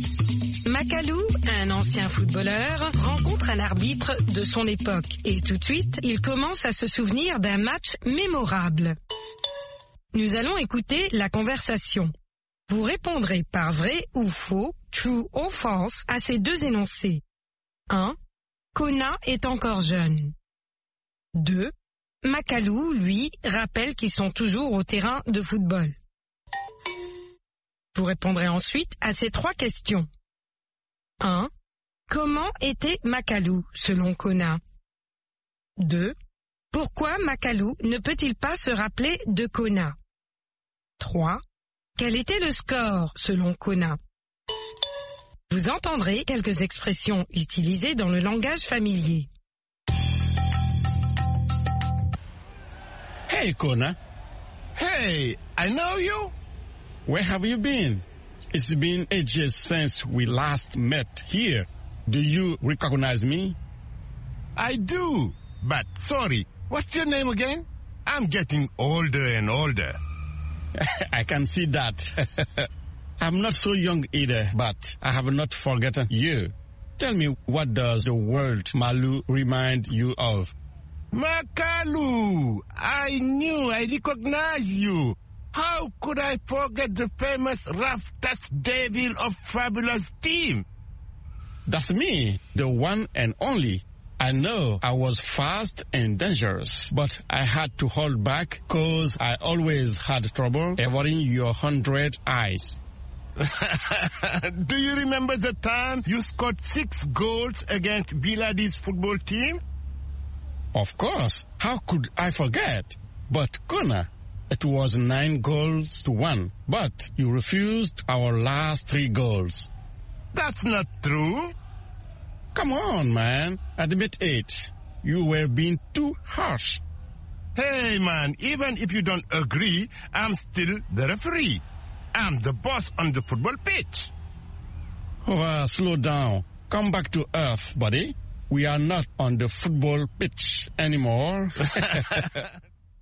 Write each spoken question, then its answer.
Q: Kona est encore jeune.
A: L'énoncé 1 est faux.

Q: Makalou, lui, rappelle qu'ils sont toujours au terrain de football.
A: L'énoncé 2 est faux.

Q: Pourquoi Makalu ne peut-il pas se rappeler de Kona?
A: Parce qu'il devient de plus en plus vieux.